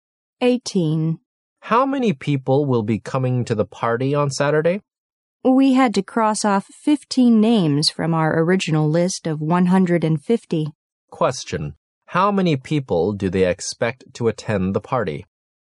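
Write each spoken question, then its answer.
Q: how many people do they expect to attend the party?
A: 135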